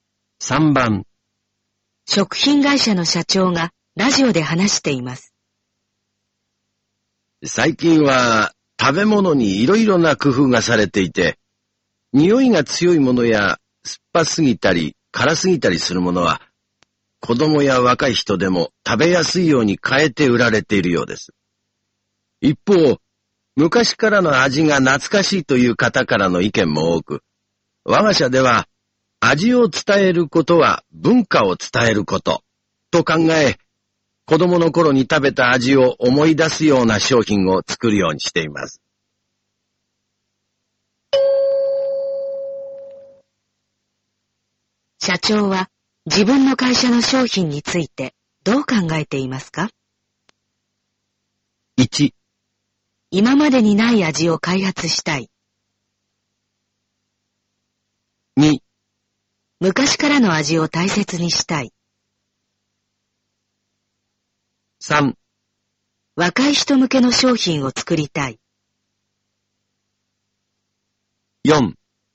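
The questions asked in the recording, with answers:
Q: 社長は自分の会社の商品についてどう考えていますか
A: 2: 昔からの味を大切にしたい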